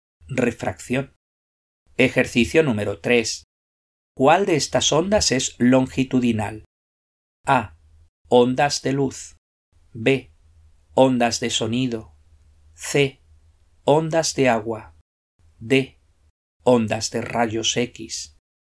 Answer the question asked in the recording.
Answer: La respuesta correcta es la B.